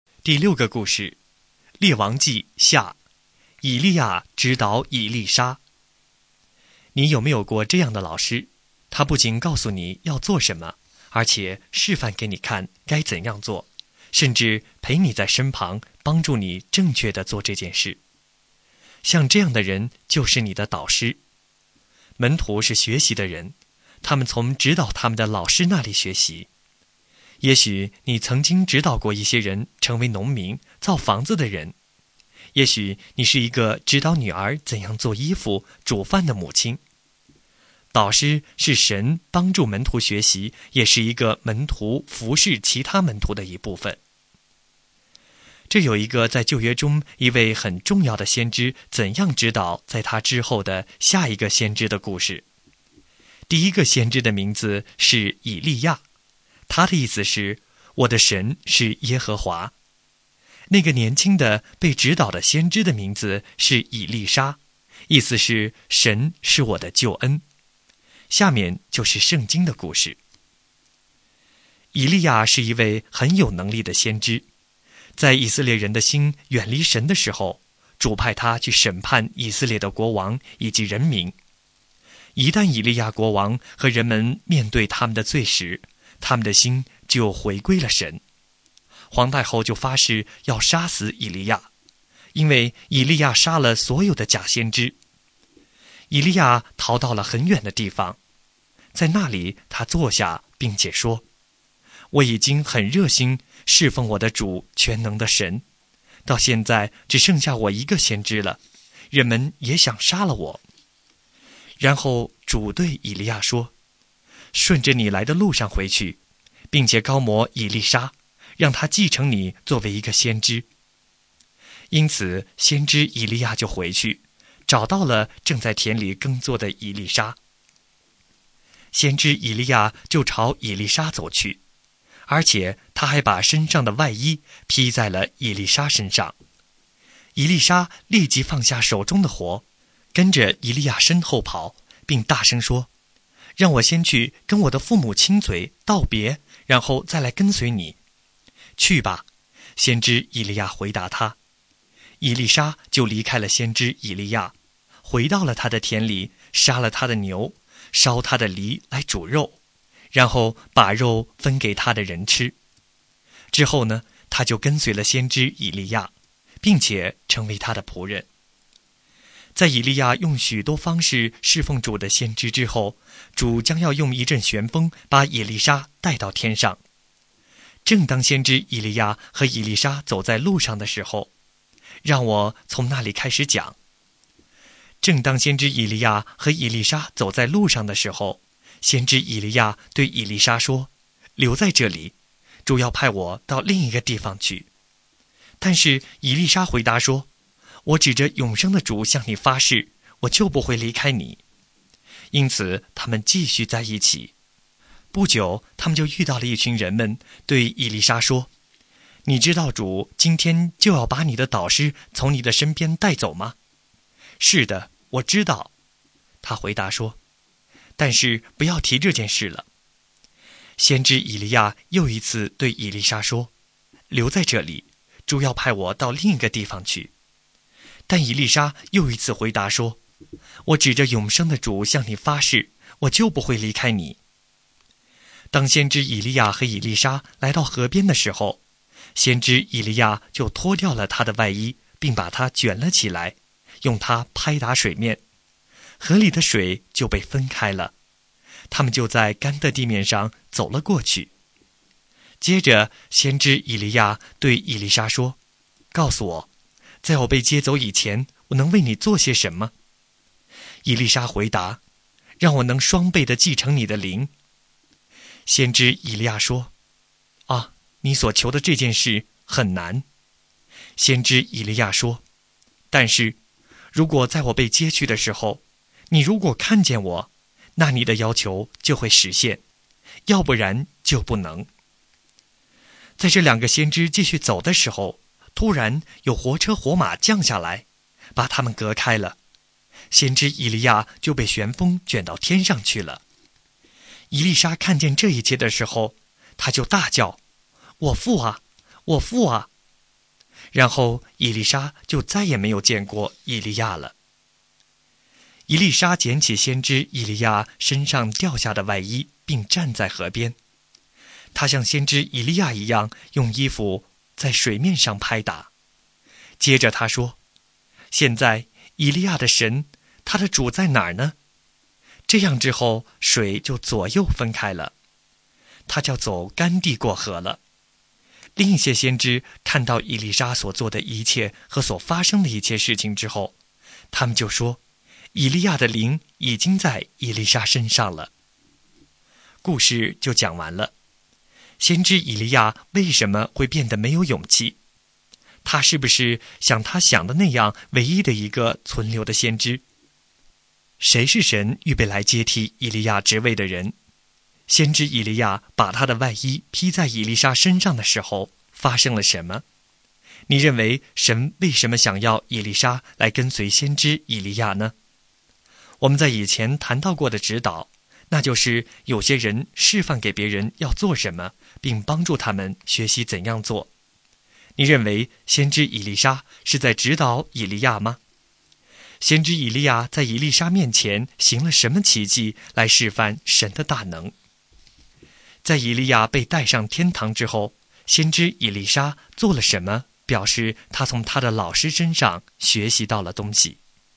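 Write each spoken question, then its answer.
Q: 先知以利亚为什么会变得没有勇气?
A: 因为皇太后发誓要杀死他,他以为只剩下他一个先知了

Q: 谁是神预备来接替以利亚职位的人?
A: 以利沙

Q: 先知以利亚把他的外衣披在以利莎身上的时候发生了什么?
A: 以利沙立即放下手中的活,跟随以利亚

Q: 先知以利亚在以利莎面前行了什么奇迹来示范神的大能?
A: 用外衣拍打河水,水分开了,他们走干地过河

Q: 在以利亚被带上天堂之后,先知以利莎做了什么,表示他从他的老师身上学习到了东西?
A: 他用以利亚的外衣拍打水面,水分开了,他走干地过河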